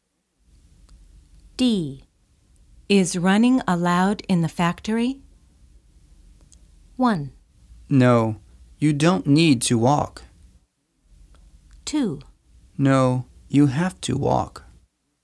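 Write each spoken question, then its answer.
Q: Is running allowed in the factory?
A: 2: No, you have to walk.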